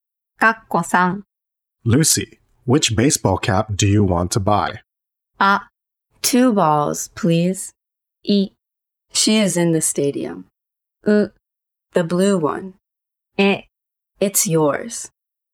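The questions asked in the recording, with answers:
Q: Lucy, which baseball cap do you want to buy?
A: う: The blue one.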